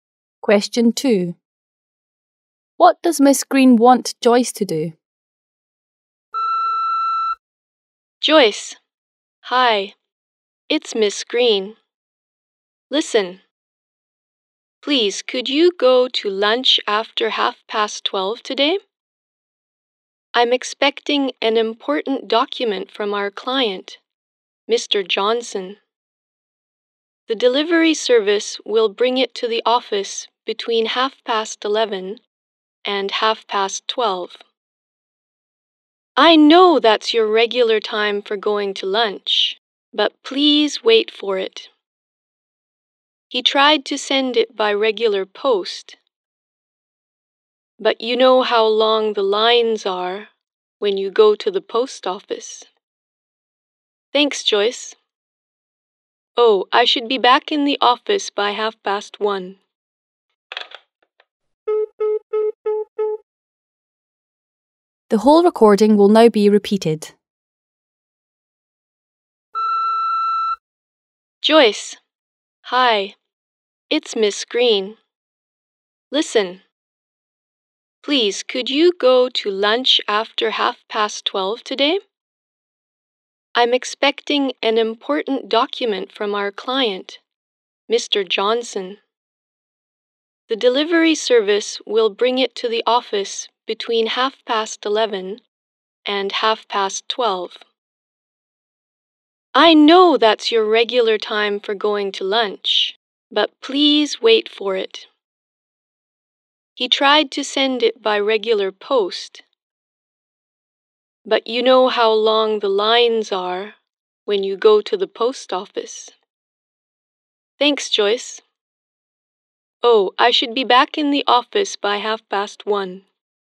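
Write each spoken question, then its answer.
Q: What does Miss Green want Joyce to do?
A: Wait in the office for a document and go to lunch after 12:30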